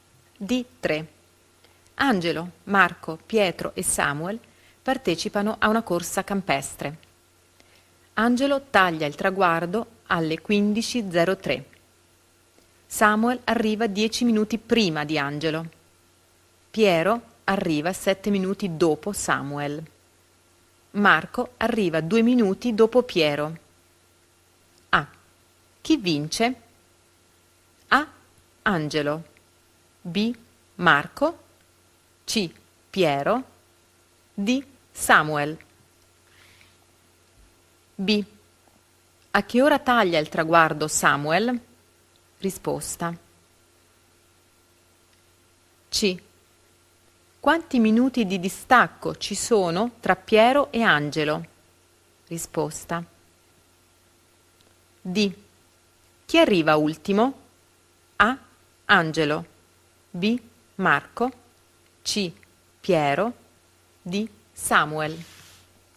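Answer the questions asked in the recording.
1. D: Samuel
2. 14:53
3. 3 minuti
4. A: Angelo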